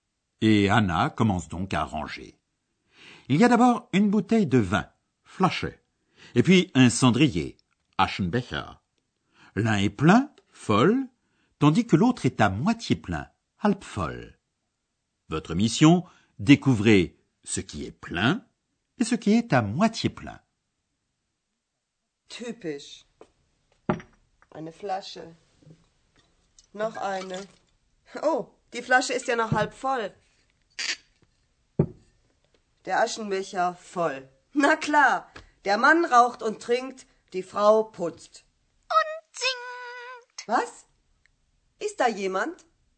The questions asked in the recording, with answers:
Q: découvrez ce qui est plein et ce qui est à moitié plein.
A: C'est le cendrier qui est plein et la bouteille de vin qui est à moitié pleine.